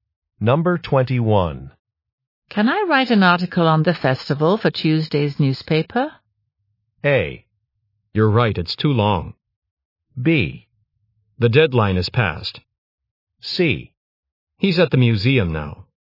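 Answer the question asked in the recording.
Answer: B: The deadline is passed.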